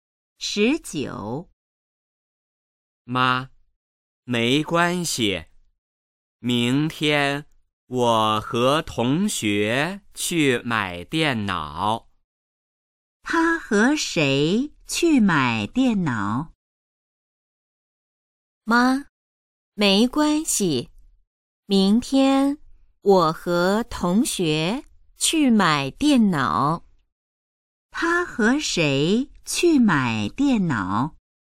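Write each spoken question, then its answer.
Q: 他和谁去买电脑?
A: 同学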